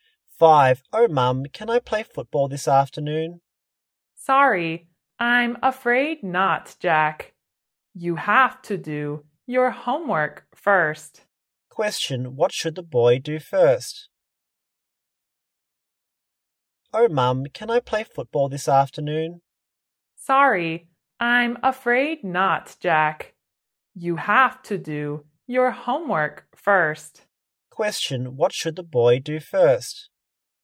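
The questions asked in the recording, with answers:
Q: what should the boy do first?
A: Do his homework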